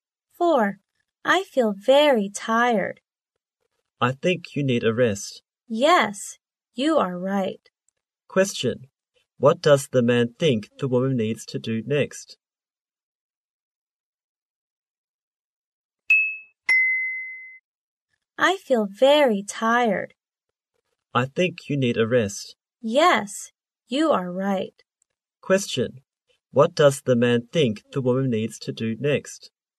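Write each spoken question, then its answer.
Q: What does the man think the woman needs to do next?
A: Have a rest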